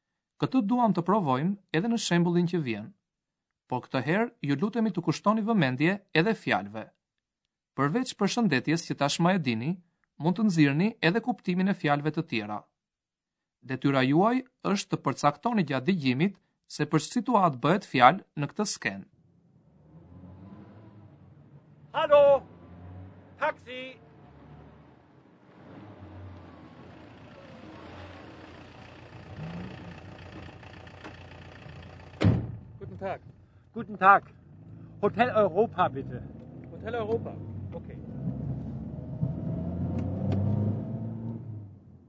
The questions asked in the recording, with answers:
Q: detyra juaj është të përcaktoni gjatë dëgjimit se për situatë bëhet fjalë në këtë skenë.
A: Një burr ndalon në rrugë një taksi dhe i thot shoferit se dëshiron të shkojë në hotel.